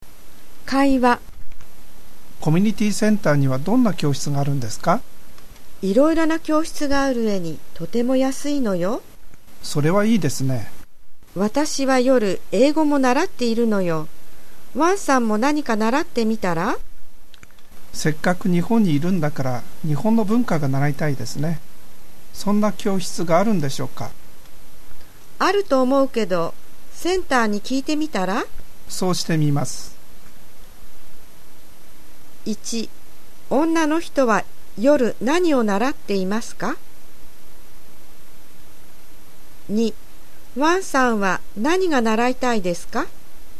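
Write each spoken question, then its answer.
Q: 女の人は夜何を習っていますか?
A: 英語

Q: ワンさんは何が習いたいですか?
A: 日本の文化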